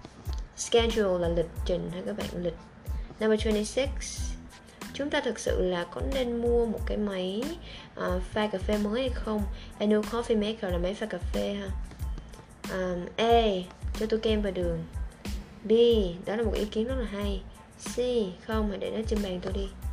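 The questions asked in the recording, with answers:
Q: chúng ta thực sự là có nên mua một cái máy pha cà phê mới hay không?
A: B: Đó là một ý kiến rất là hay.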